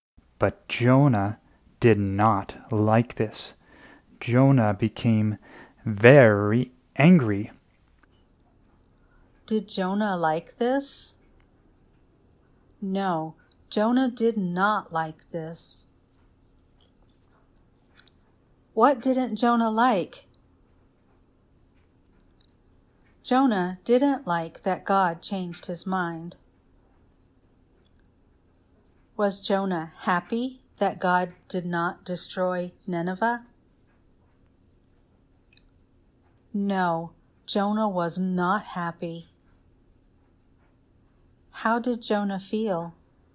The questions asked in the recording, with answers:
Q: How did Jonah feel?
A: Jonah felt very angry.